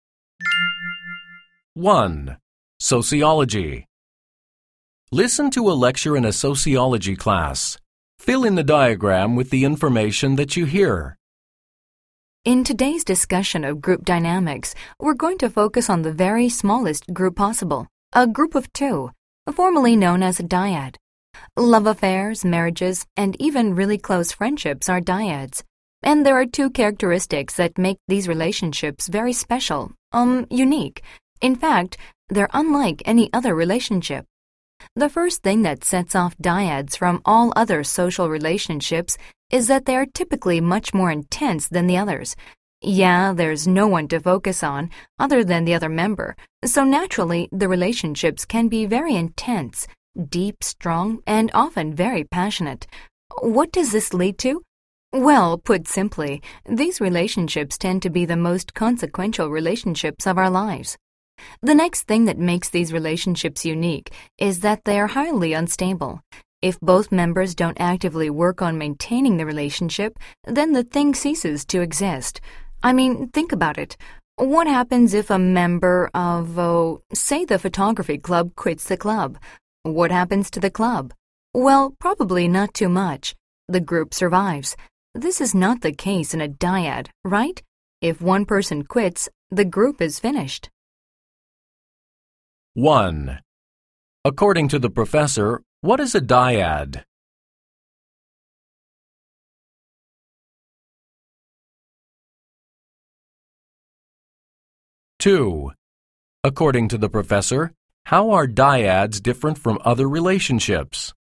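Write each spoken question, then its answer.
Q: According to the professor, what is a dyad?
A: A group of two people, the smallest possible group (e.g. a love affair, marriage or close friendship)

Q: According to the professor, how are dyads different from other relationships?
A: They are usually much more intense, and they are highly unstable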